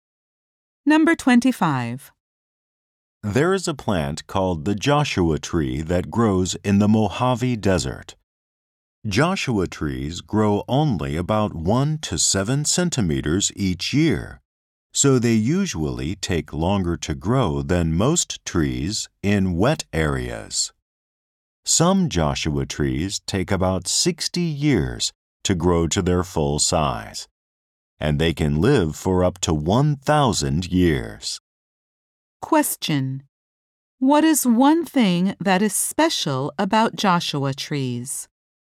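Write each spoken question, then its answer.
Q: What is one thing that is special about Joshua trees?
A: They grow slowly and can live for up to 1,000 years.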